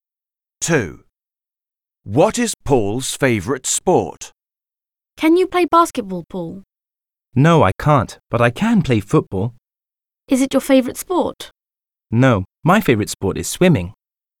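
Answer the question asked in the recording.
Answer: swimming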